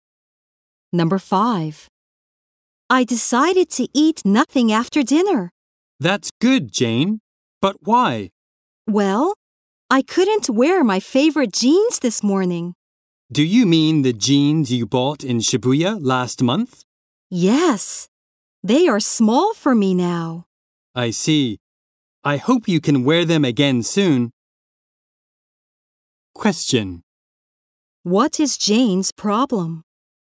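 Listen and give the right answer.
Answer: She can't wear her favorite jeans because they are too small now.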